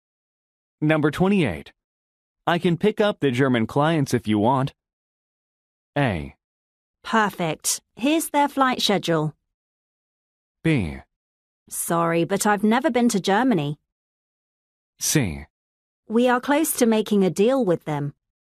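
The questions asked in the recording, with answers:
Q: I can pick up the German clients if you want.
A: A: Perfect. Here's their flight schedule.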